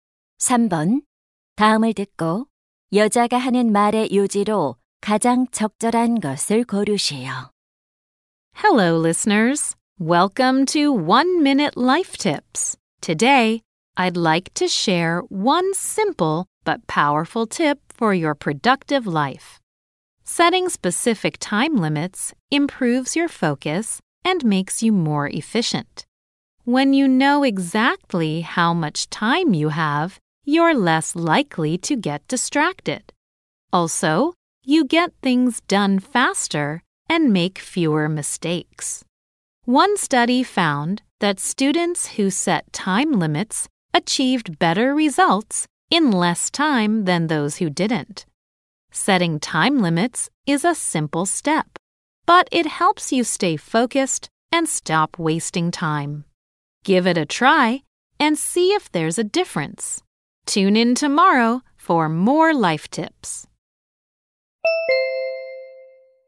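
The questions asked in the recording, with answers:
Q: 다음을 듣고 여자가 하는 말의 요지로 가장 적절한 것을 고르시오.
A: 구체적인 시간 제한을 정하면 집중력과 효율이 높아진다.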